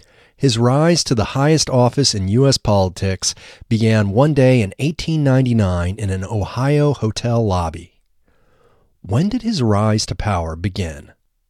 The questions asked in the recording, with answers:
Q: When did his rise to power begin?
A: His rise to power began one day in 1899.